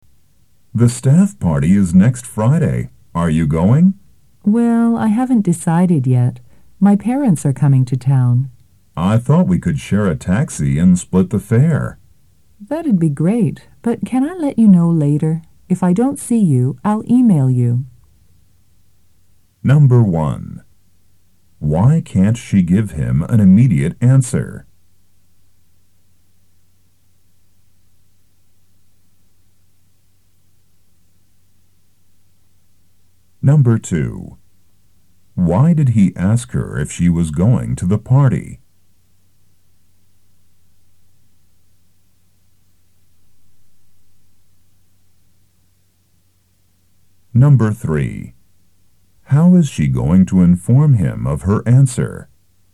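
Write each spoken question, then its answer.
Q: Why can't she give him an immediate answer?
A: Her parents are coming to town, so she hasn't decided yet.

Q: Why did he ask her if she was going to the party?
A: He thought they could share a taxi and split the fare.

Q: How is she going to inform him of her answer?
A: By email (if she doesn't see him).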